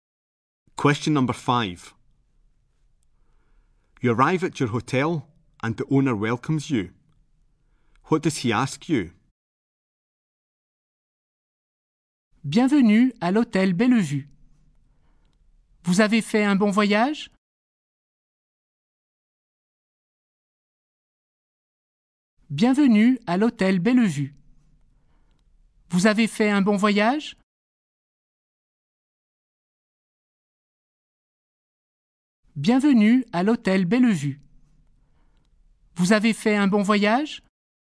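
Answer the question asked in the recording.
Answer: If you had a good journey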